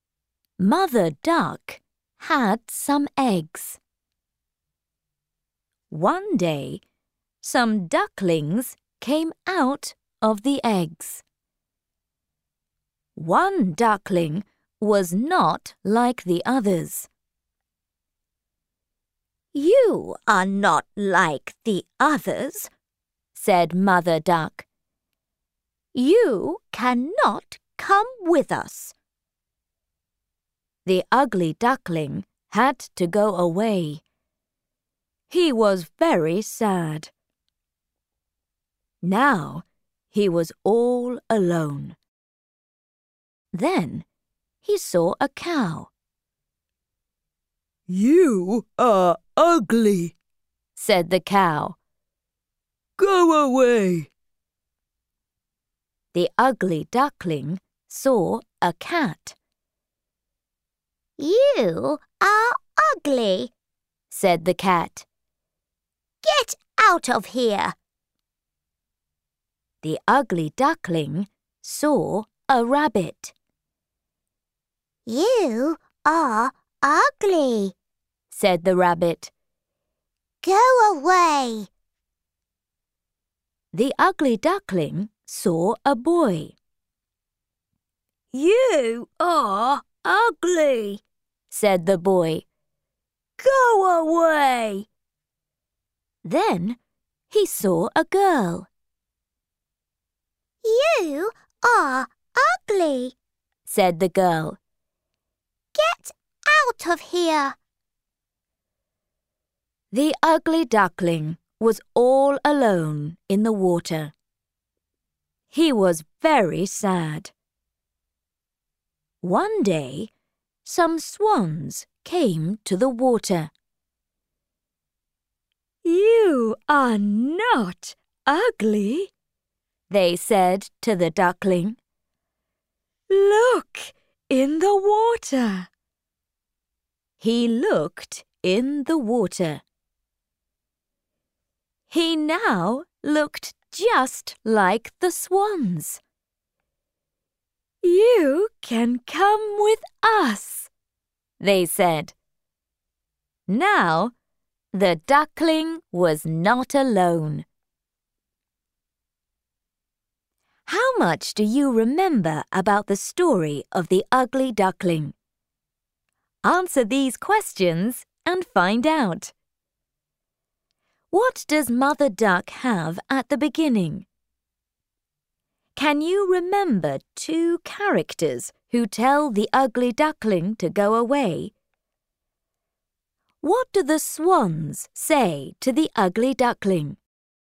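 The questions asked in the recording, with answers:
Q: What does Mother Duck have at the beginning?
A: Some eggs

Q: Can you remember two characters who tell the ugly duckling to go away?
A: Any two of: the cow, the cat, the rabbit, the boy, the girl

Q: What do the swans say to the ugly duckling?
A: "You are not ugly. Look in the water." / "You can come with us."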